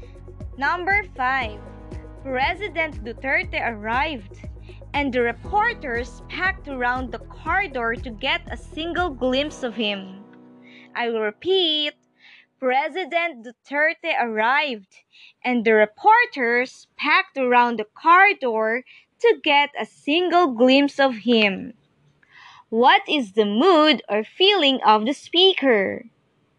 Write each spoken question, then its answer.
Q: What is the mood or feeling of the speaker?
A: Yes, the speaker's mood or feeling is excited.